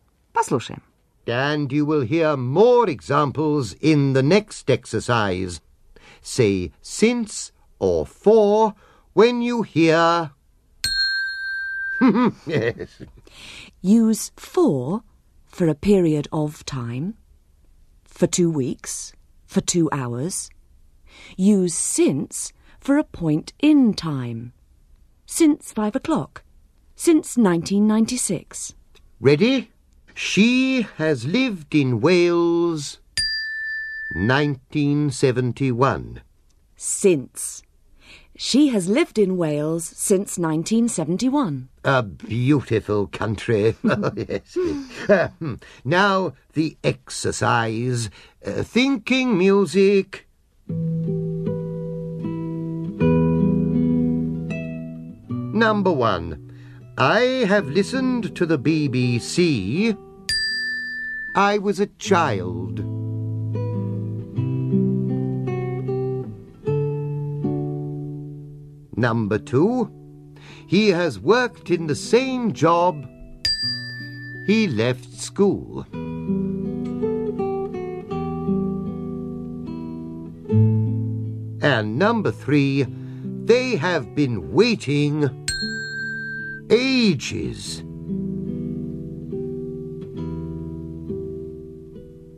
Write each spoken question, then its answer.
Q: I have listened to the BBC... I was a child.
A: Since.

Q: He has worked in the same job. He left school.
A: Since.

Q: they have been waiting ages.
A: Four.